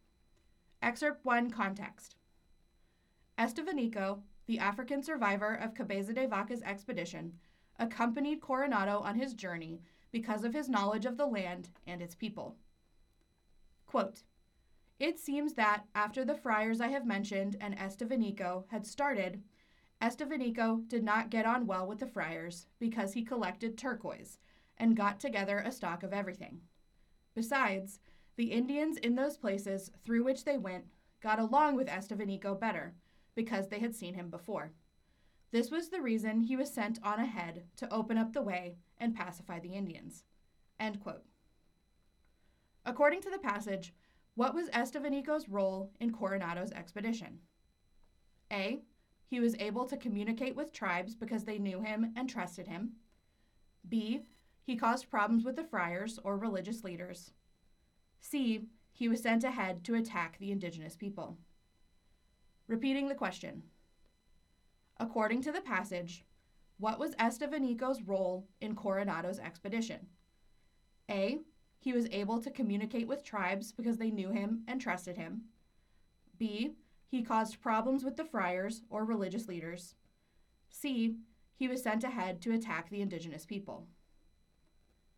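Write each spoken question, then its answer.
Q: According to the passage, what was Estevanico's role in Coronado's expedition?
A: A: He was able to communicate with tribes because they knew him and trusted him.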